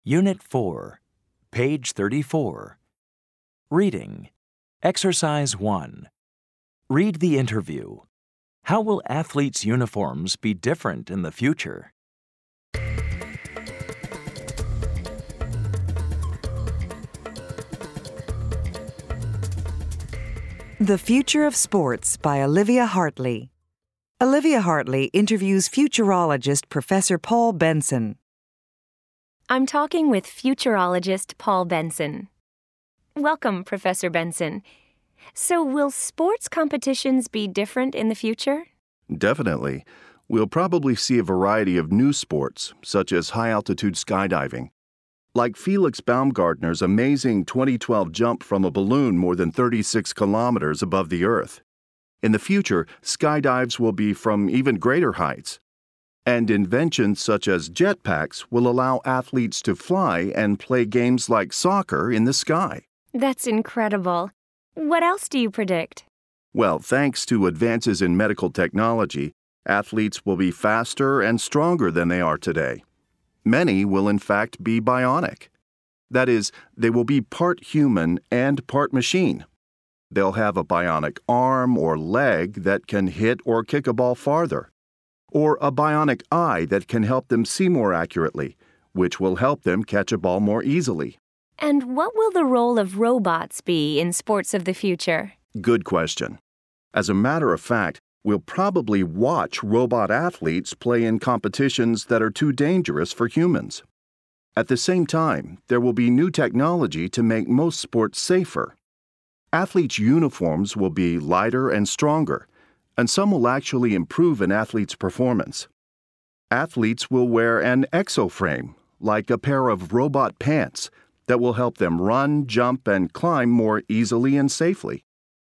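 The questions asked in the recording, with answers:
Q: How will athletes' uniforms be different in the future?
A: They will be lighter and stronger, and some will improve an athlete's performance.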